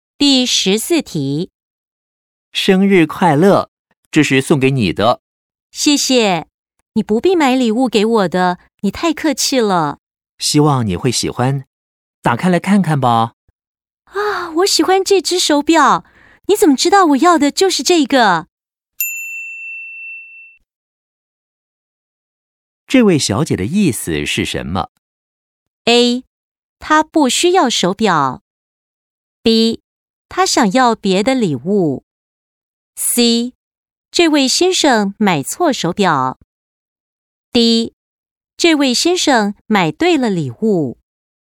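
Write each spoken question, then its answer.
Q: 这位小姐的意思是什么?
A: D: 这位先生买对了礼物。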